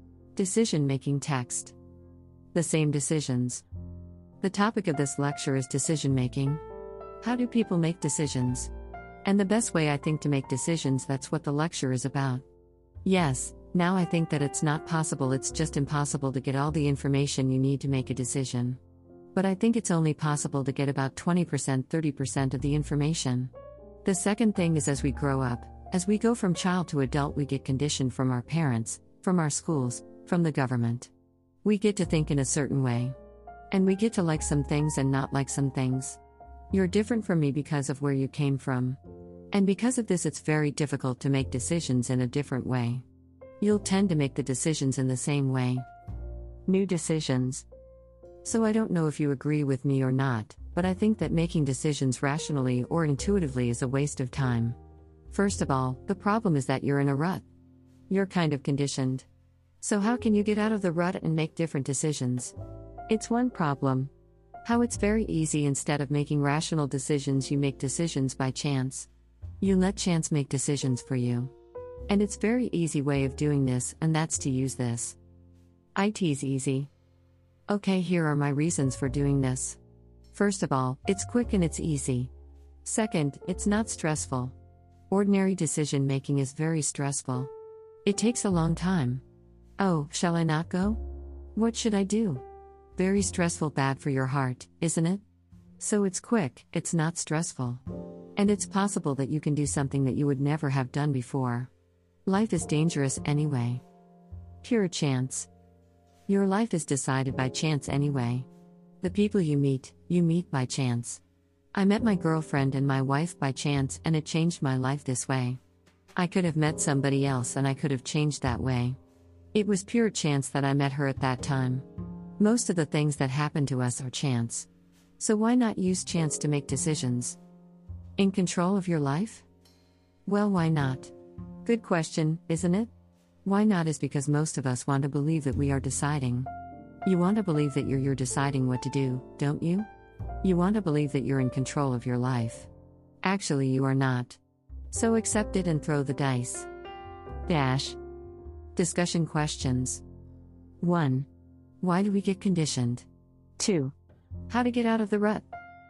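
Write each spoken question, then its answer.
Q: Why do we get conditioned?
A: Because as we grow up we are conditioned by our parents, schools and the government

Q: How to get out of the rut.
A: Make decisions by chance (throw the dice)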